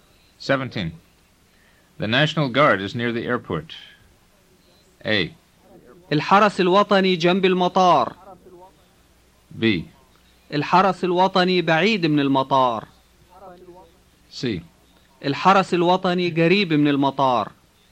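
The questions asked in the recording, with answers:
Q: The National Guard is near the airport.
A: C: الحرس الوطني قريب من المطار.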